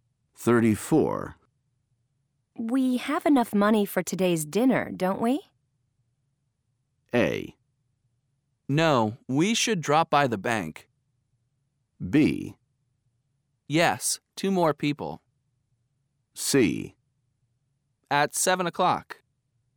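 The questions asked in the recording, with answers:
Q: We have enough money for today's dinner, don't we?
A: A: No, we should drop by the bank.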